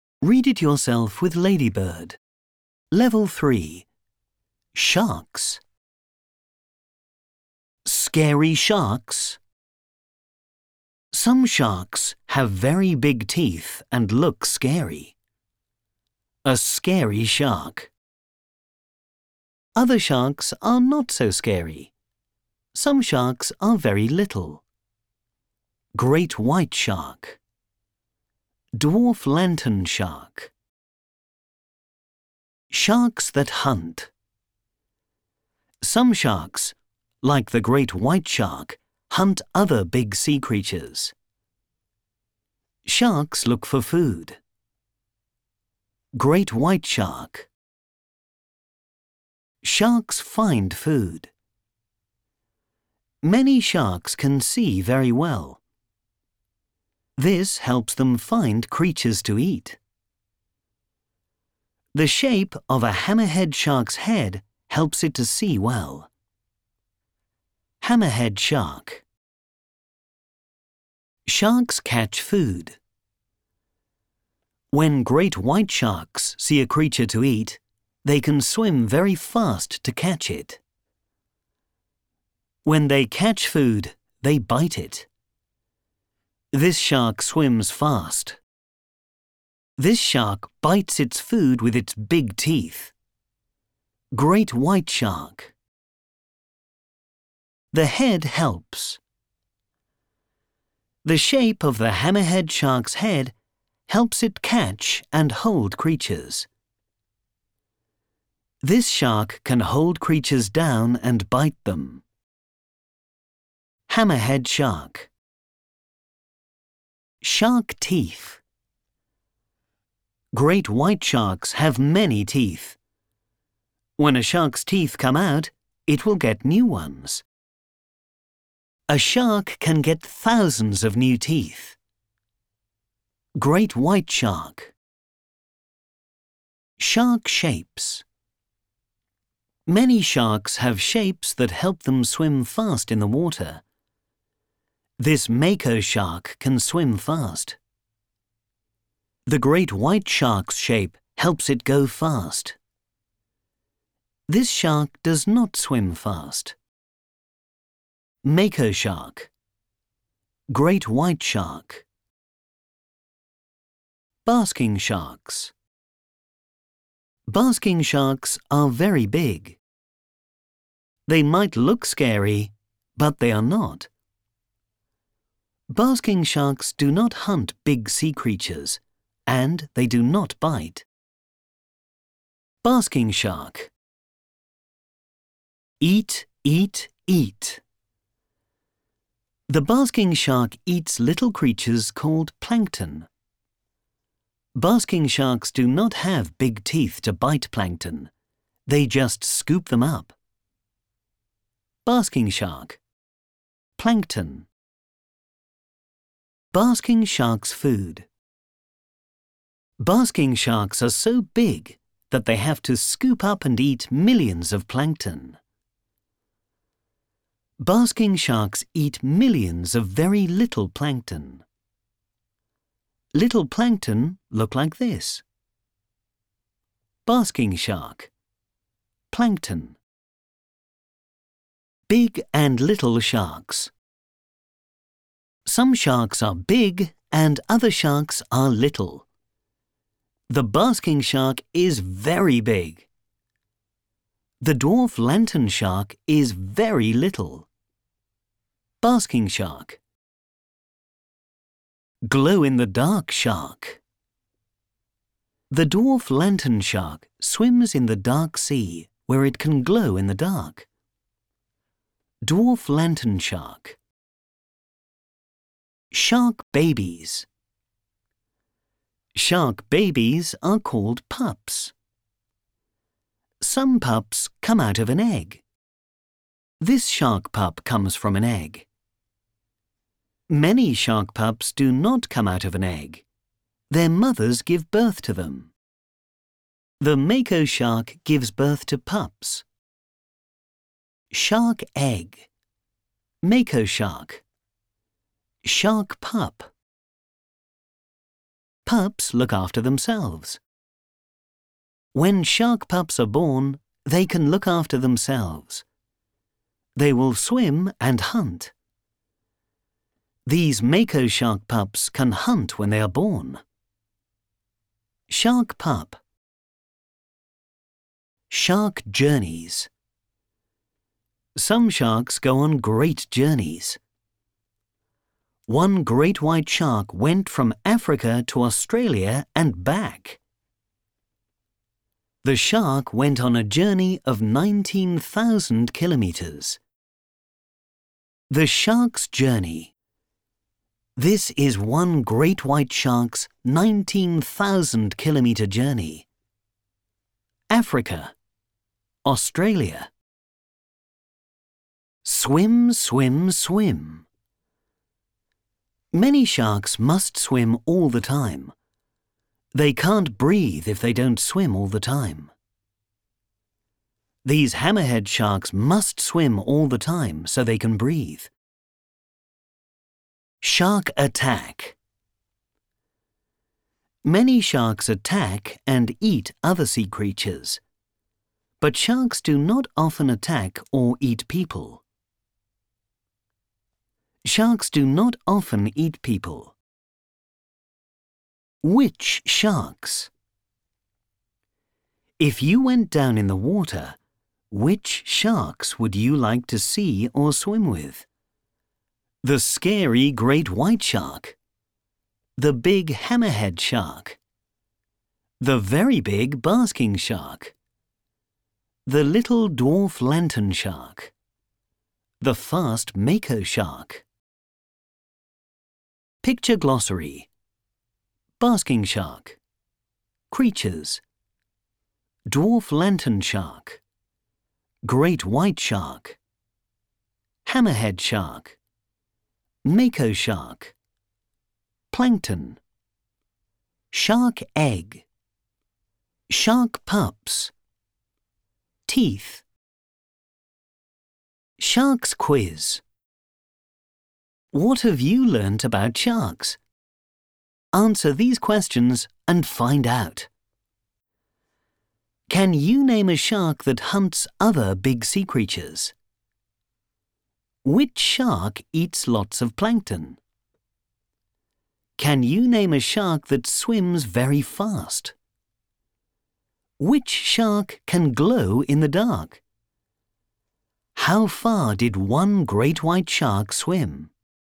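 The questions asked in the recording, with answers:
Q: Can you name a shark that hunts other big sea creatures?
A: The great white shark

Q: Which shark eats lots of plankton?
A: The basking shark

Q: Can you name a shark that swims very fast?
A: The mako shark (or great white shark)

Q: Which shark can glow in the dark?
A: The dwarf lantern shark

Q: How far did one great white shark swim?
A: 19,000 kilometers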